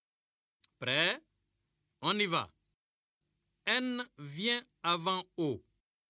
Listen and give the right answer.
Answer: Monsieur, je me suis levé.